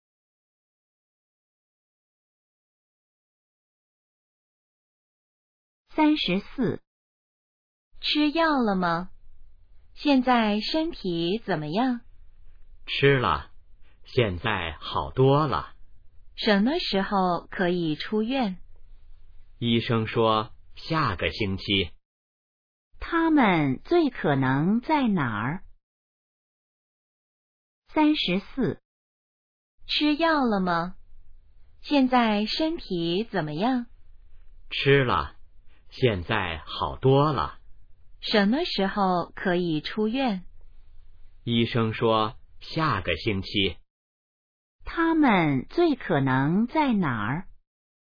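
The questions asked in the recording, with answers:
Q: 他们最可能在哪儿?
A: 医院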